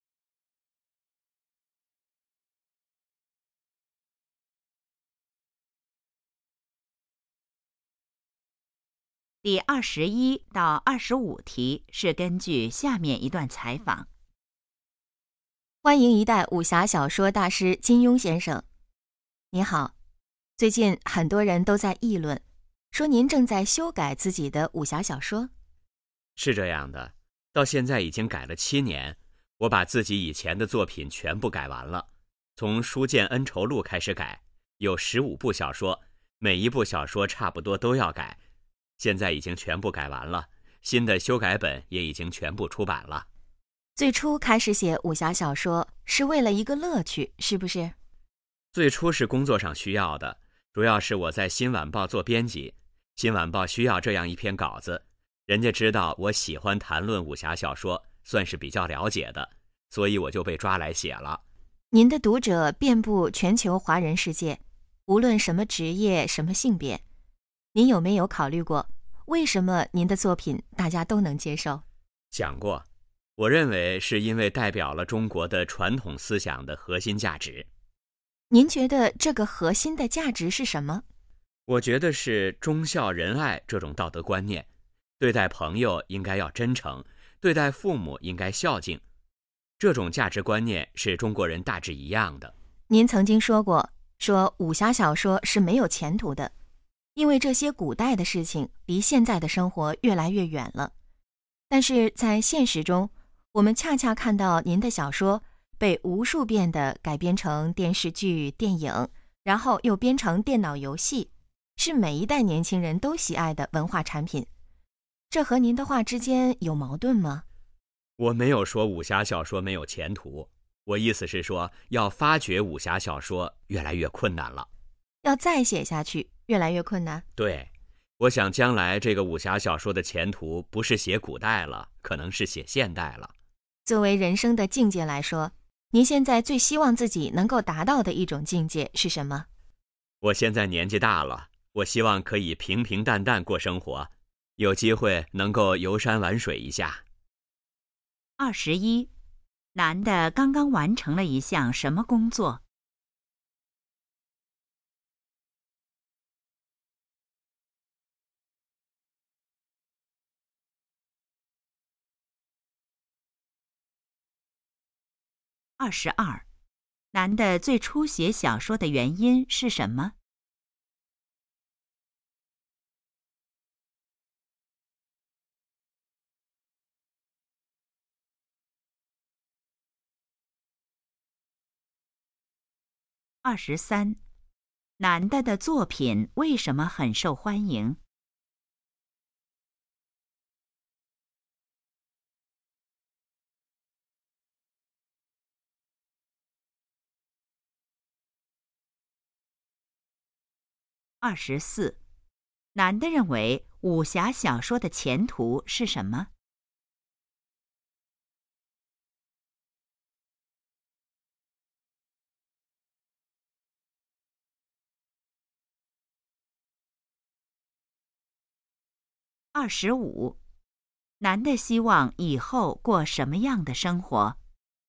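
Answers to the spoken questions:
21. 修改自己以前的武侠小说
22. 工作需要,新晚报需要稿子
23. 代表了中国传统思想的核心价值
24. 可能是写现代
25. 平平淡淡,游山玩水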